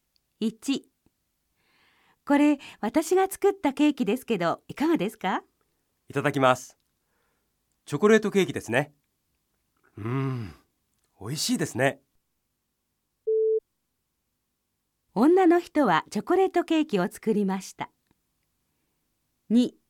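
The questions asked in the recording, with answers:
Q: 女の人はチョコレートケーキを作りました。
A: ○(正しい)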